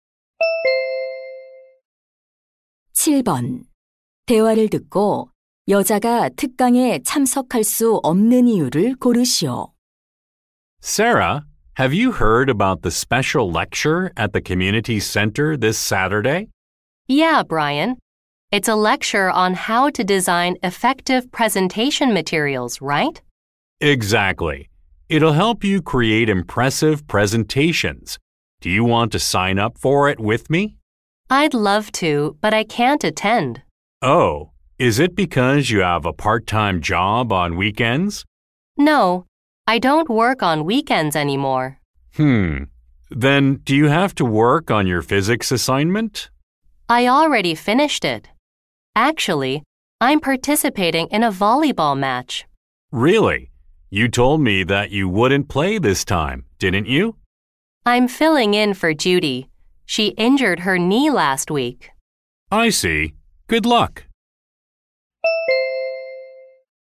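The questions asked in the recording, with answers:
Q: 대화를 듣고 여자가 특강에 참석할 수 없는 이유를 고르시오.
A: 배구 시합에 (다친 친구 대신) 참가해야 해서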